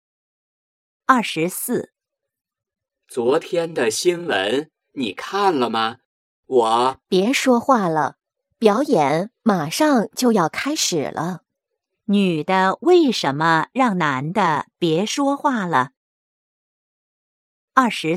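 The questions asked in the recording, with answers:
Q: 女的为什么让男的别说话了?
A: 表演马上就要开始了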